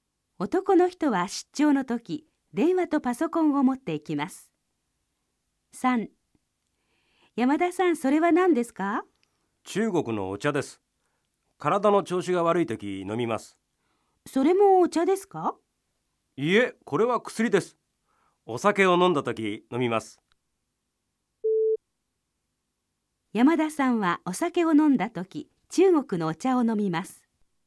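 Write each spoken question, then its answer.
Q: 山田さんはお酒を飲んだ時中国のお茶を飲みます。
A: ×(お酒を飲んだ時は薬を飲む)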